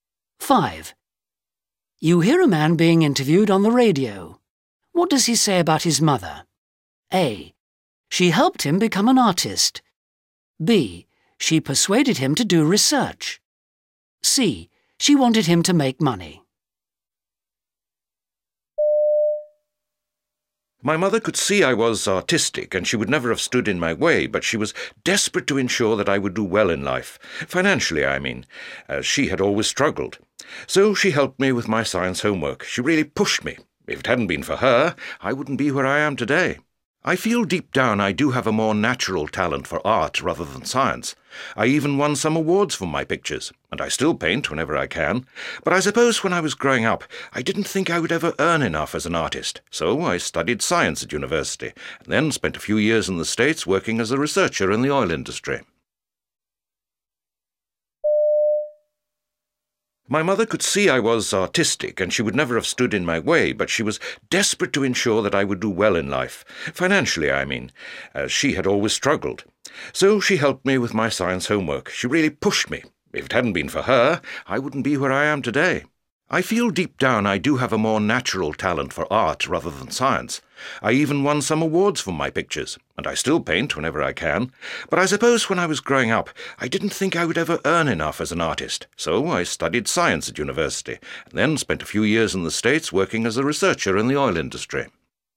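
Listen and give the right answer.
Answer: C: She wanted him to make money.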